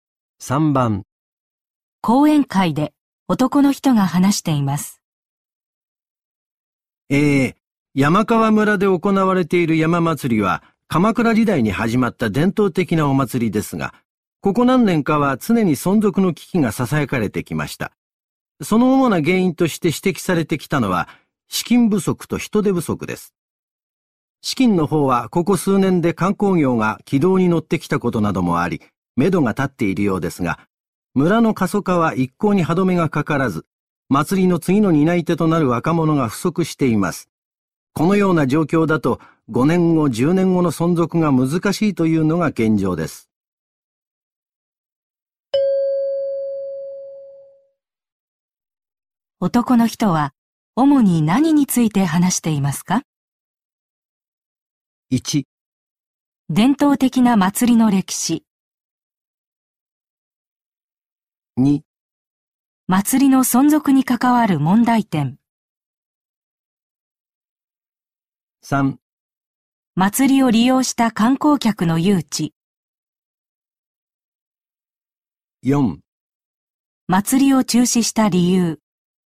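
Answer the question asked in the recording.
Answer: 2: 祭りの存続に関わる問題点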